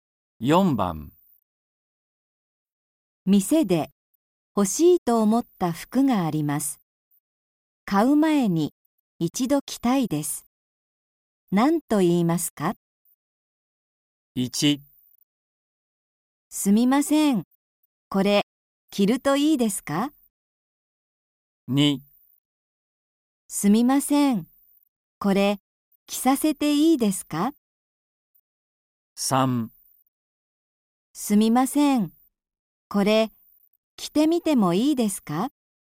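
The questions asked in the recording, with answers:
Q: 何と言いますか?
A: 3: すみません、これ着てみてもいいですか?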